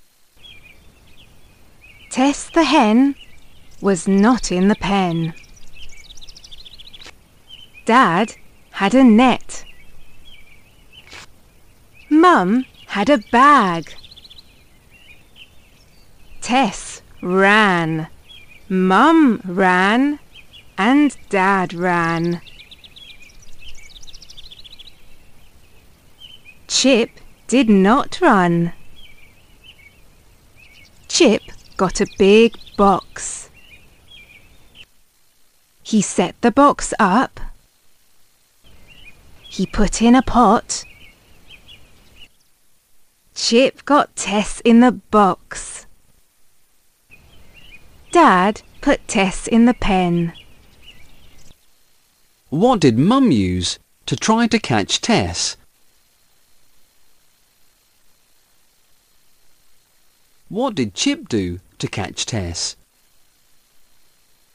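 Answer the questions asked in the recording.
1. A bag
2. He set up a big box with a pot in it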